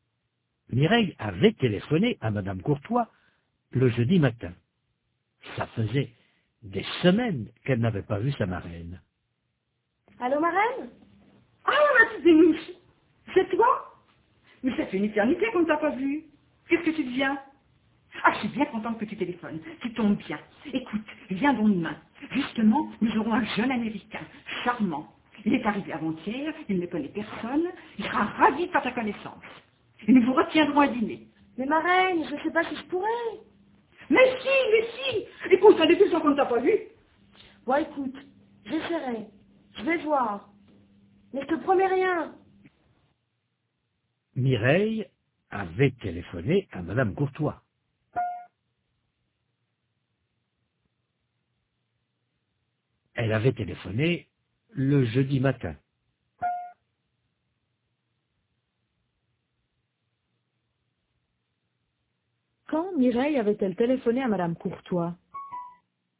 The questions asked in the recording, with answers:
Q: Quand Mireille avait-elle téléphoné à Madame Courtois?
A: Le jeudi matin.